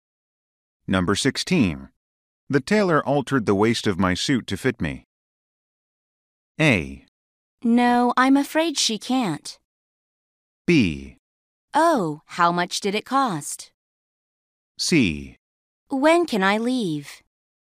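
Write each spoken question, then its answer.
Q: The tailor altered the waist of my suit to fit me.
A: B: Oh, how much did it cost?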